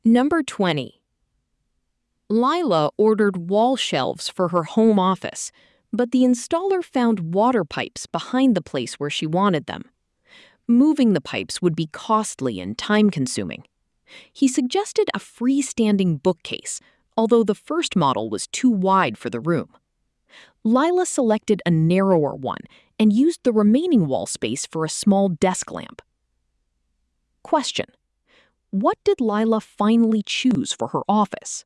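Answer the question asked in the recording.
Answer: A narrower freestanding bookcase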